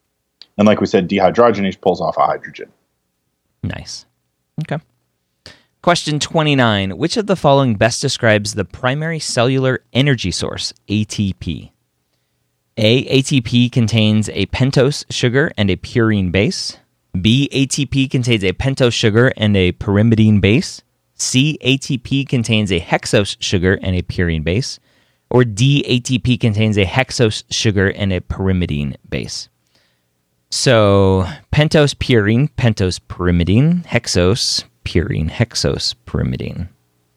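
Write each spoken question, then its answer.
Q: Which of the following best describes the primary cellular energy source, ATP?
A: A: ATP contains a pentose sugar and a purine base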